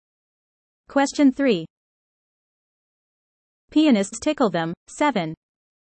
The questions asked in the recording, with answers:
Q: Pianists tickle them, 7.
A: Answer? Ivories.